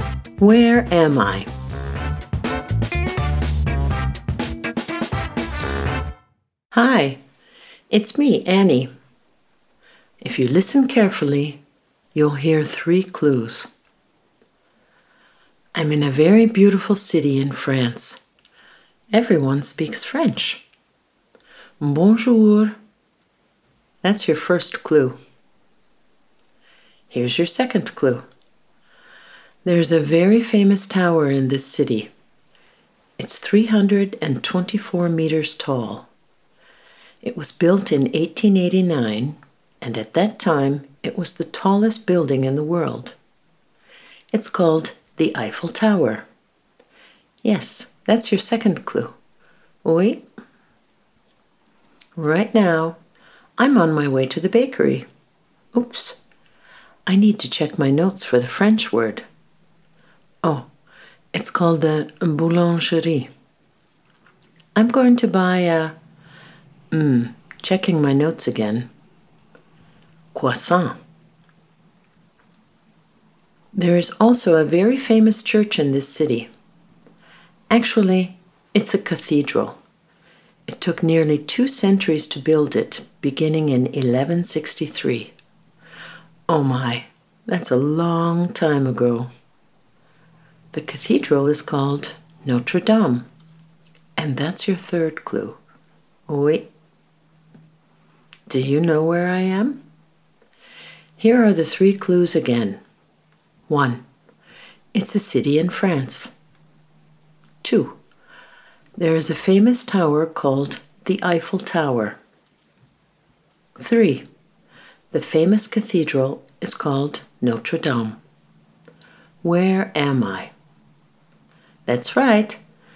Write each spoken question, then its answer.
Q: Where am I?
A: I'm in Paris.